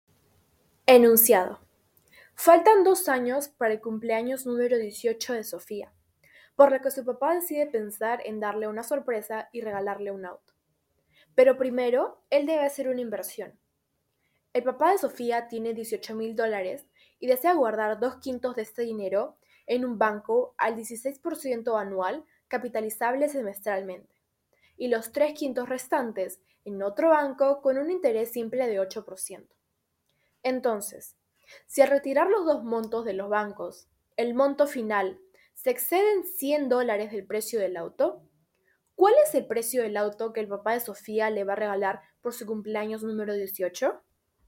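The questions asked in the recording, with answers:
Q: ¿cuál es el precio del auto que el papá de Sofía le va a regalar por su cumpleaños número 18?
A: $22,223.52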